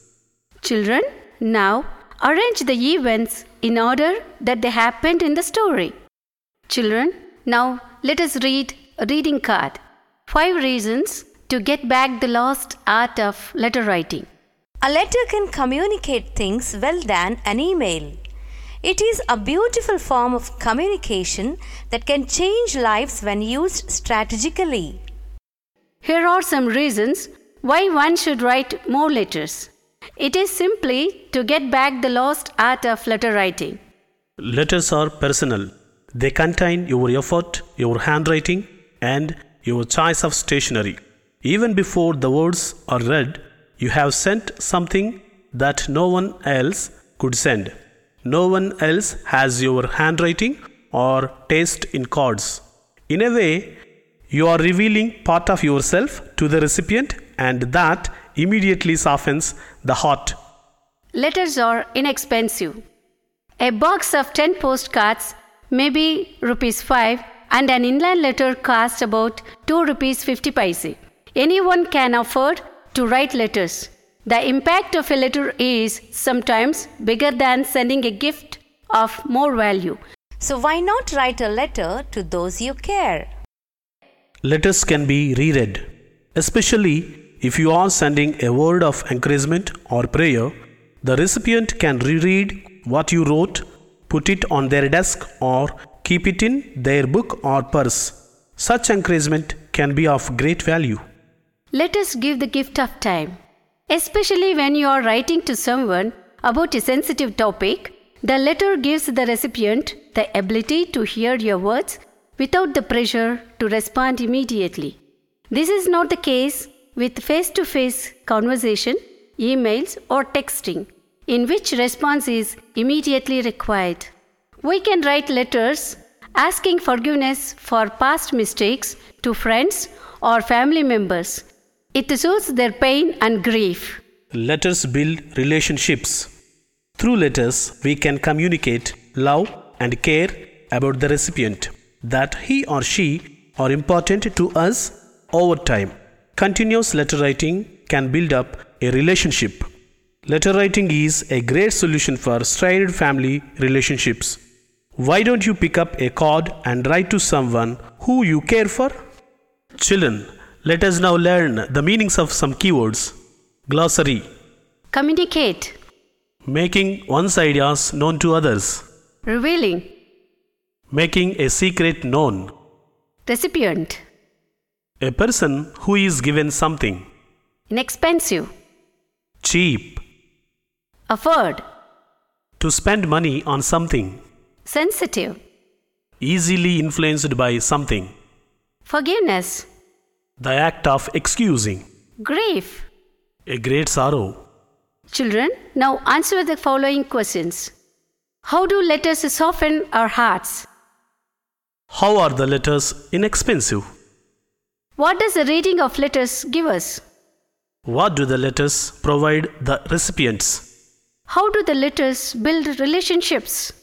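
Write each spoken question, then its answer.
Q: How do letters soften our hearts?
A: They are personal, with your effort, handwriting and choice of stationery, so they reveal part of you to the recipient.

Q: How are the letters inexpensive?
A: A box of 10 postcards may cost 5 rupees and an inland letter about 2 rupees 50 paise, so anyone can afford them.

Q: What do the letters provide the recipients?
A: The gift of time: they can hear your words without pressure to respond immediately.

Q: How do the letters build relationships?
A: They communicate love and care over time, and continuous letter writing builds up a relationship.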